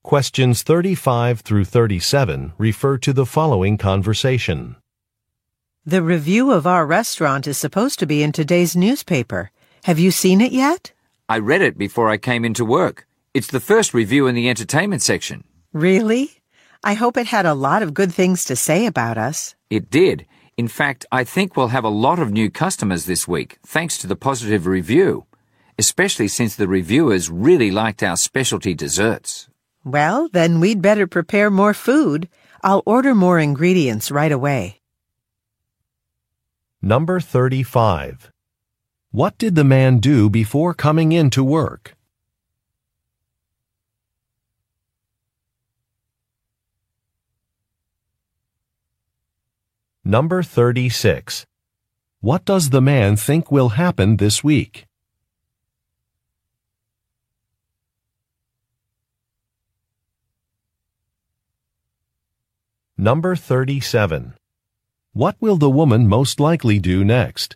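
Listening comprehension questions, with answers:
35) What did the man do before coming in to work?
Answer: He read a newspaper.

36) What does the man think will happen this week?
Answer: There will be more customers.

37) What will the woman most likely do next?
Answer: Place an order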